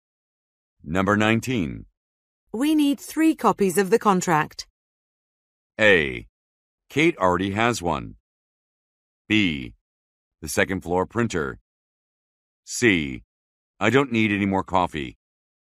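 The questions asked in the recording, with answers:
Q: We need 3 copies of the contract.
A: A: Kate already has one.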